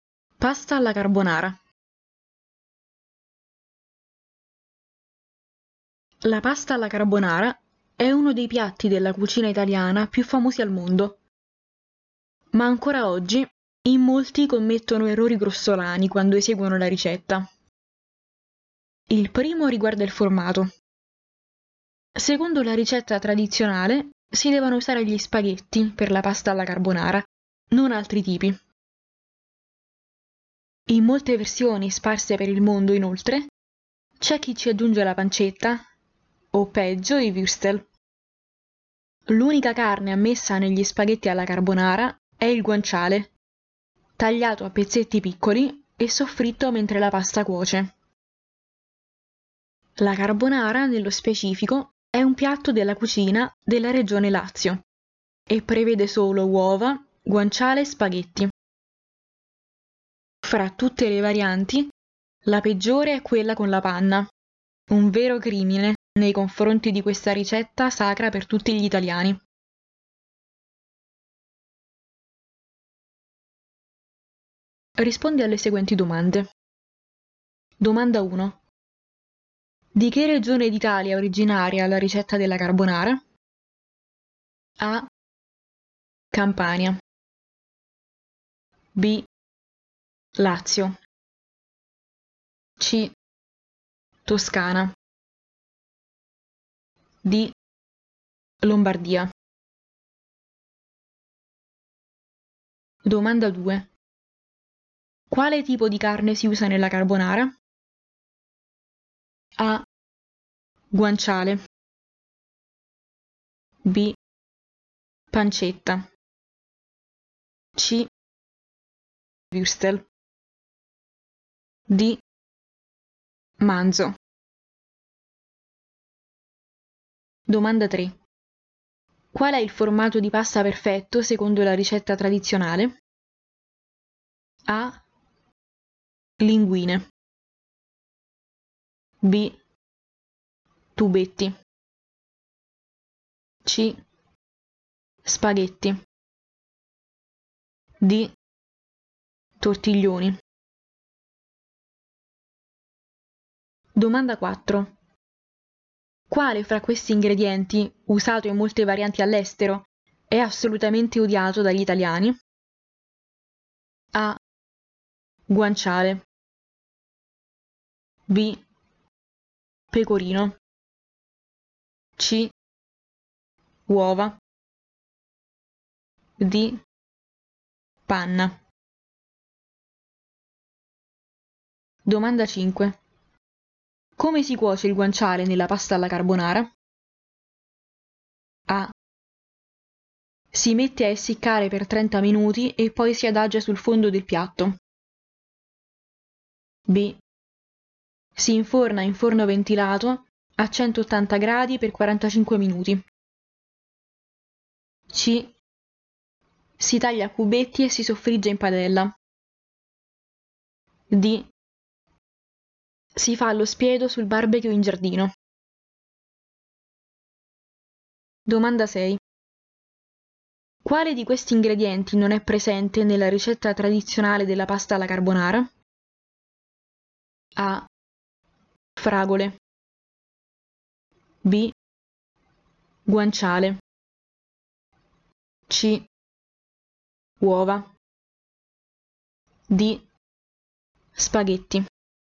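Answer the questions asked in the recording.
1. B: Lazio
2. A: Guanciale
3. C: Spaghetti
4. D: Panna
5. C: Si taglia a cubetti e si soffrigge in padella.
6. A: Fragole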